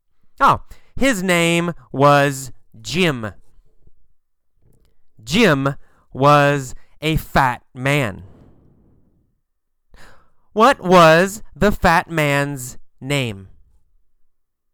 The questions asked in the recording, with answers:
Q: What was the fat man's name?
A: Jim. The fat man's name was Jim.